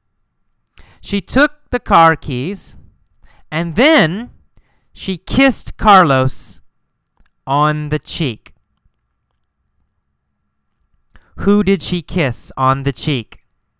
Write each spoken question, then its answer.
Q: Who did she kiss on the cheek?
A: Carlos. She kissed Carlos on the cheek.